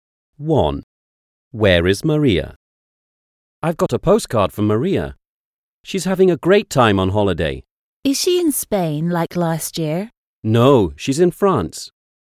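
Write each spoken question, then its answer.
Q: Where is Maria?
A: In France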